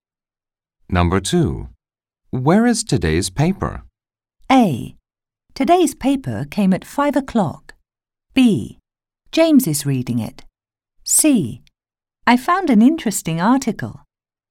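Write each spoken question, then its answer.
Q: Where is today's paper?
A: B: James is reading it.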